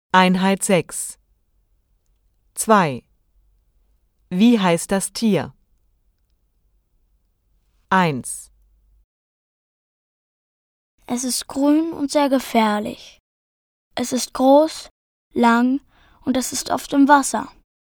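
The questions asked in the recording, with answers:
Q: Wie heißt das Tier?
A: das Krokodil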